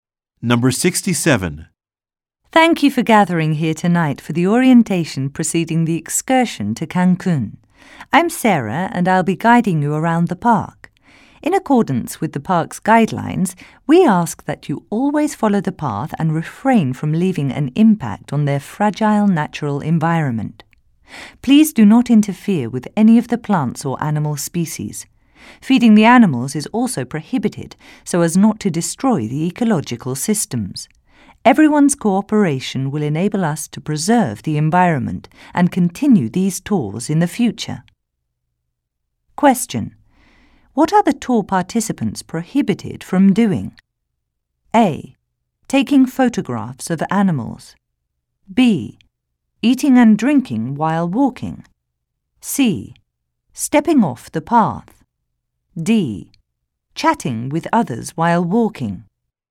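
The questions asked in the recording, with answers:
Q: What are the tour participants prohibited from doing?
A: C: Stepping off the path.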